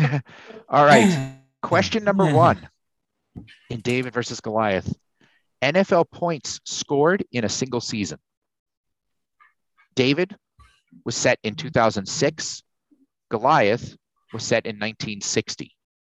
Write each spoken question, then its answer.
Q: NFL points scored in a single season.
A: So the record set in 2006 was 186 points, and that was LaDainian Tomlinson.